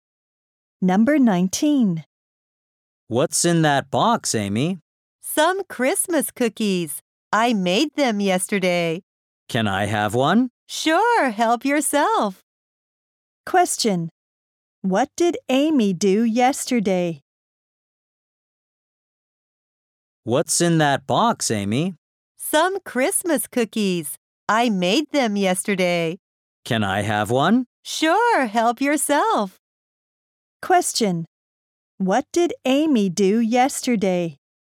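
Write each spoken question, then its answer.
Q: What did Amy do yesterday?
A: She made Christmas cookies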